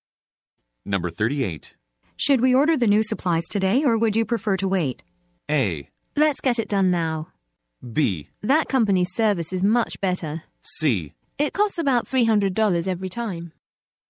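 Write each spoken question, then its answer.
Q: Should we order the new supplies today, or would you prefer to wait?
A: A: Let's get it done now.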